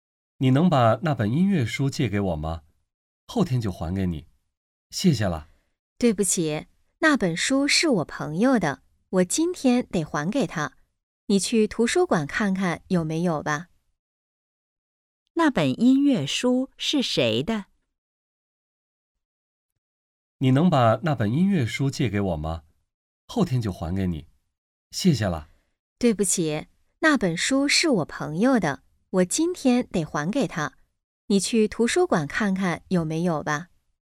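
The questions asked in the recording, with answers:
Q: 那本音乐书是谁的?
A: 朋友的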